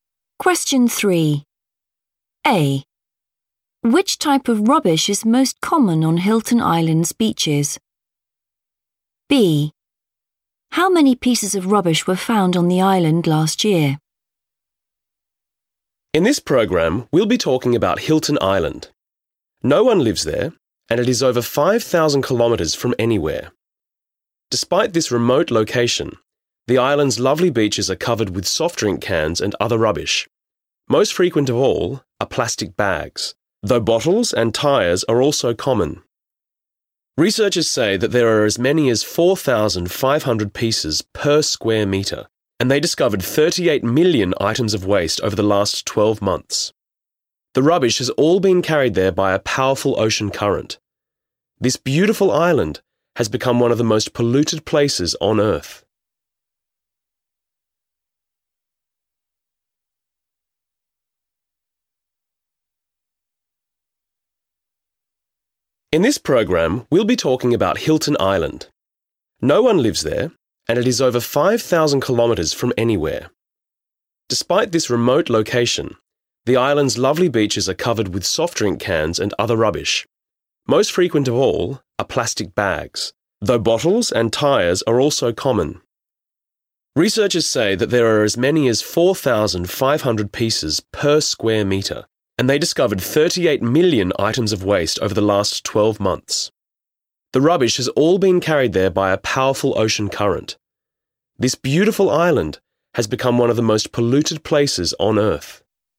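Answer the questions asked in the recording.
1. plastic bags
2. 38 million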